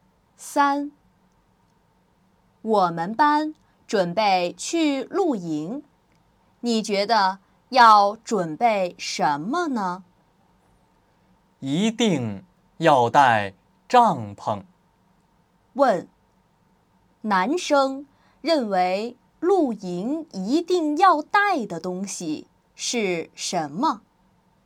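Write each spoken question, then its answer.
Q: 问,男生认为露营一定要带的东西是什么?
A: 帐篷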